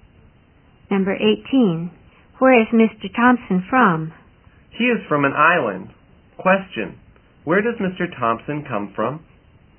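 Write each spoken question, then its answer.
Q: Where does Mr. Thompson come from?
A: From an island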